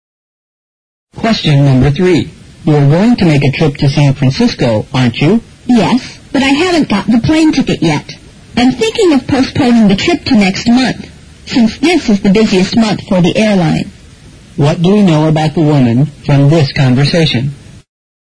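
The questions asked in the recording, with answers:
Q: What do we know about the woman from this conversation?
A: She hasn't got her plane ticket yet and is thinking of postponing her trip to next month.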